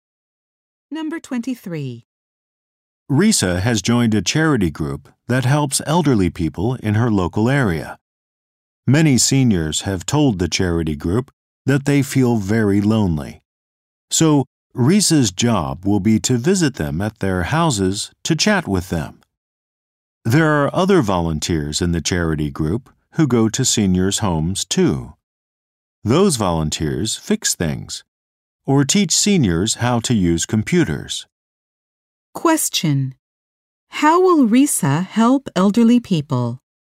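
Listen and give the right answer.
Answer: By visiting them at home to chat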